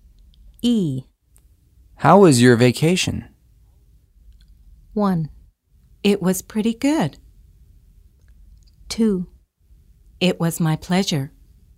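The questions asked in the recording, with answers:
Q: How was your vacation?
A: 1: It was pretty good.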